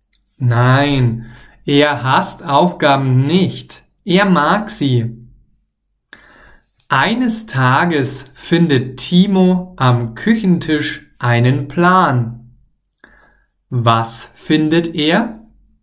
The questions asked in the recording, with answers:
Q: Was findet er?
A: Einen Plan. Er, also Timo, findet einen Plan am Küchentisch.